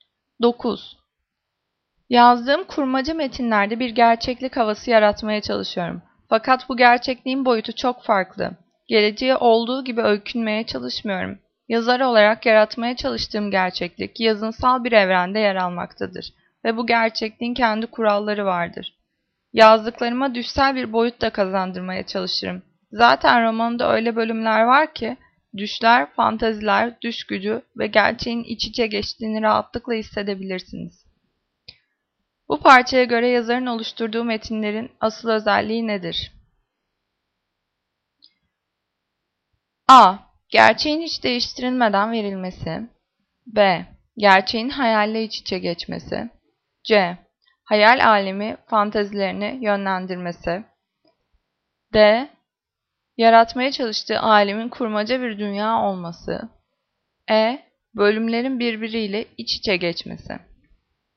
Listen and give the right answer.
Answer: Cevap B. Gerçeğin hayalle iç içe geçmesi.